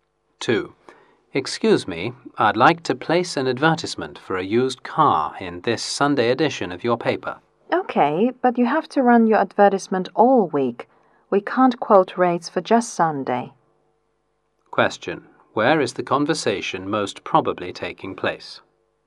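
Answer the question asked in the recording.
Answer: At a newspaper office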